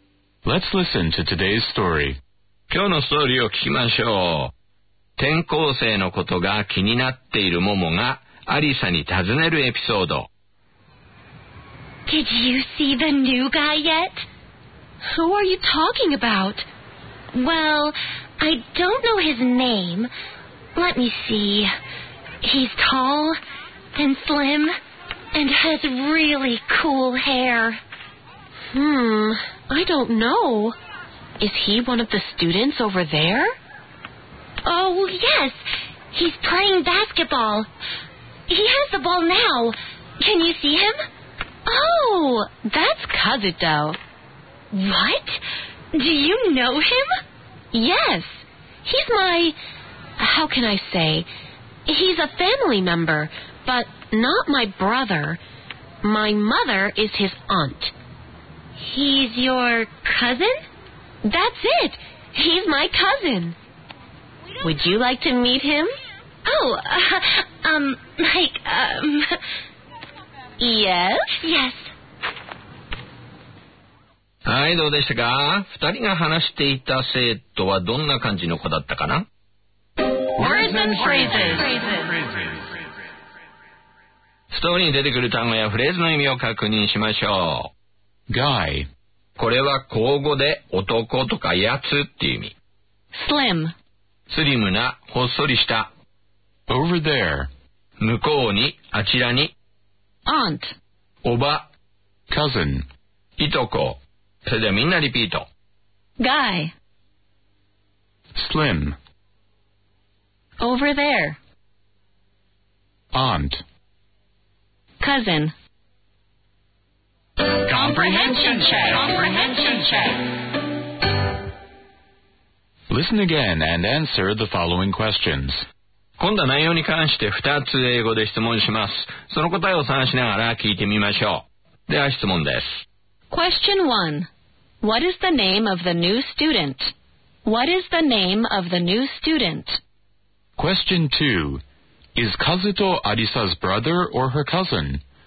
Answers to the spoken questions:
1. Answer.His name is Kazuto.
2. Answer. Her cousin.